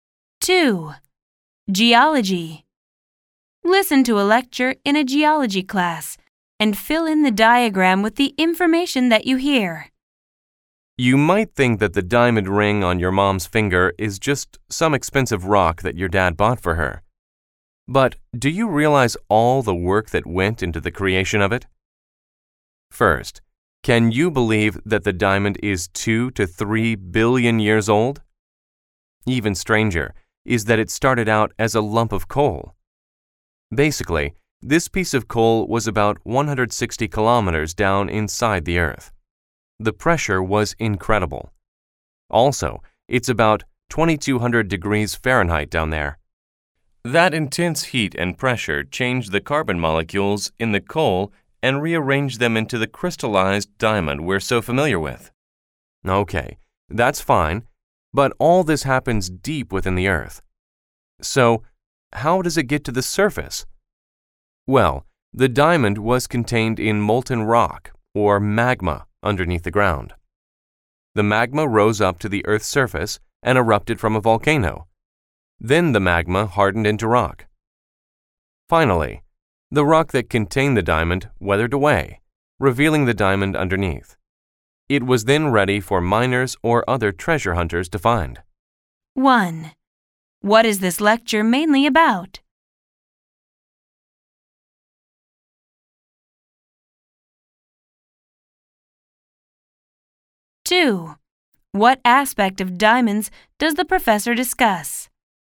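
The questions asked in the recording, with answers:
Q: What is this lecture mainly about?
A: How diamonds are formed and come to the Earth's surface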